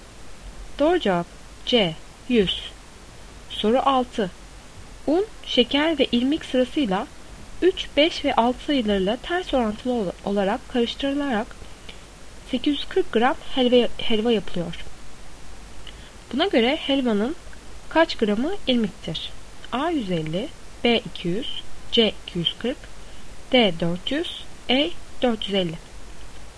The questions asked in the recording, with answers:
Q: Buna göre helvanın kaç gramı irmiktir?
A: Doğru cevap B 200.